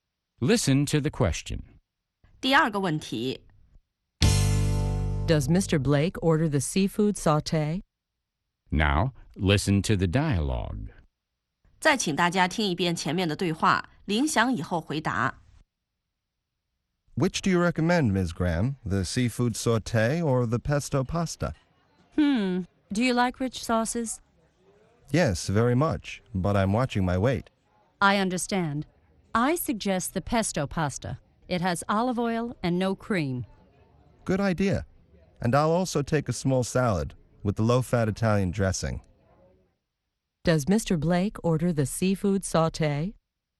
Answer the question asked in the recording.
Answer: No, he doesn't. He orders the pesto pasta.